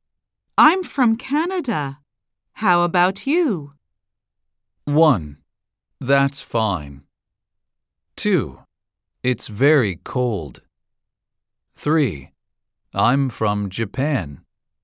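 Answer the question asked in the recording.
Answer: 3: I'm from Japan.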